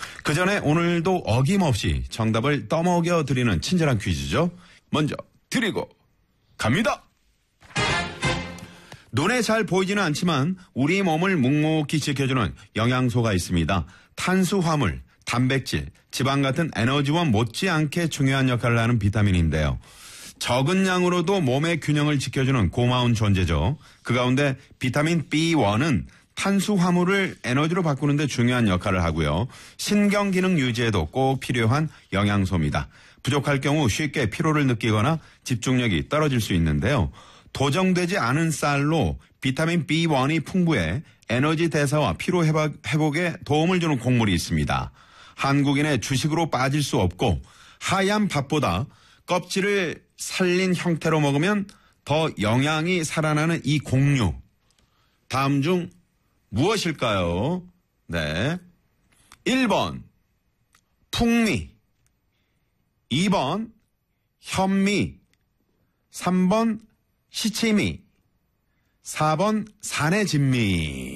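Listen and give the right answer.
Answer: 2번: 현미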